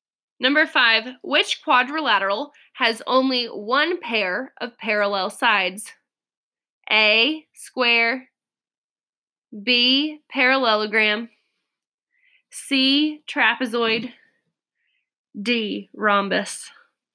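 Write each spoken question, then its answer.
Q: Which quadrilateral has only one pair of parallel sides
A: C: trapezoid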